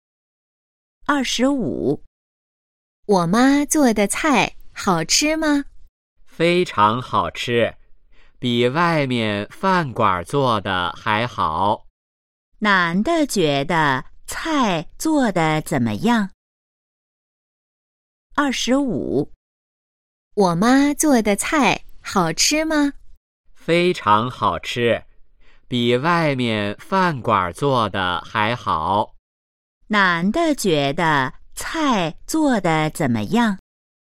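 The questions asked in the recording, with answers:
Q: 男的觉得菜做的怎么样?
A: 非常好吃,比外面饭馆做的还好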